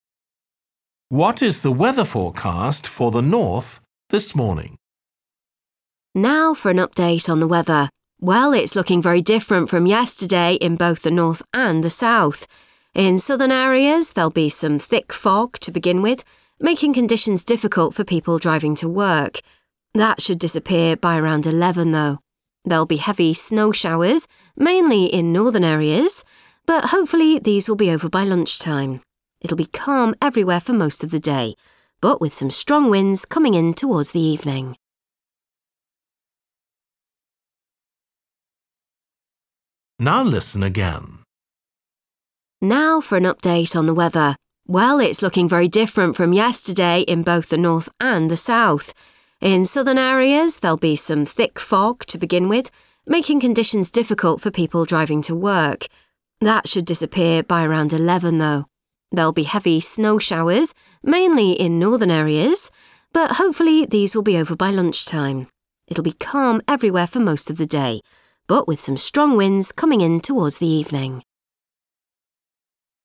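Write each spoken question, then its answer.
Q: What is the weather forecast for the north this morning?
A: heavy snow showers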